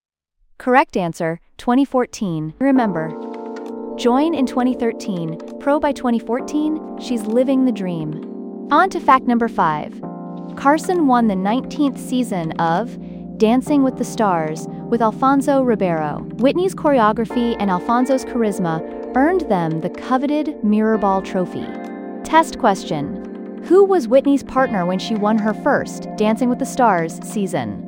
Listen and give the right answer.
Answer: Alfonso Ribeiro.